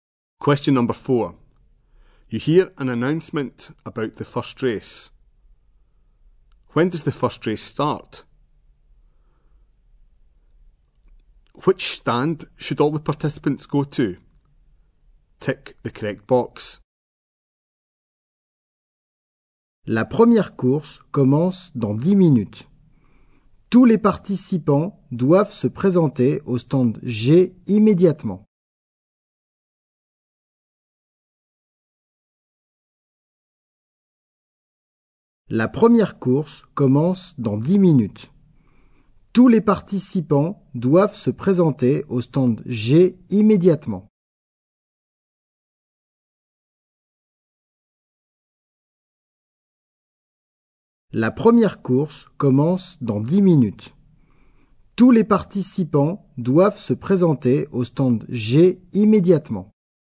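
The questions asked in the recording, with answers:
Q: When does the first race start?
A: In 10 minutes

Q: Which stand should all the participants go to?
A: Stand G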